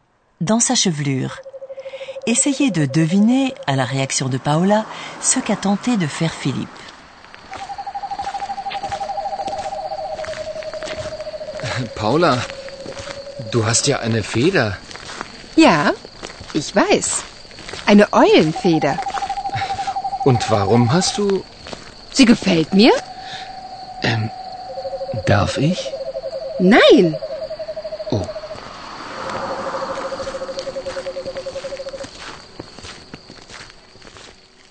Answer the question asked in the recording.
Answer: Philippe essaie probablement de retirer la plume des cheveux de Paola.